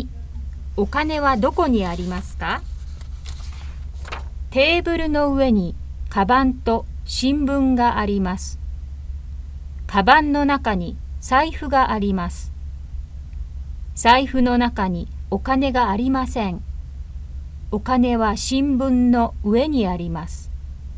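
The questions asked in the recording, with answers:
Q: お金はどこにありますか?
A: 新聞の上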